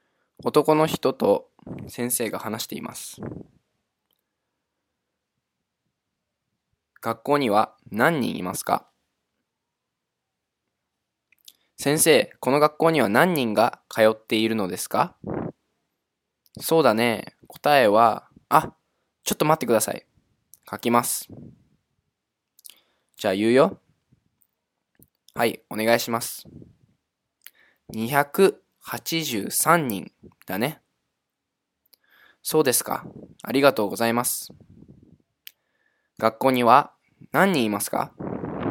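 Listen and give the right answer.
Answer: 283人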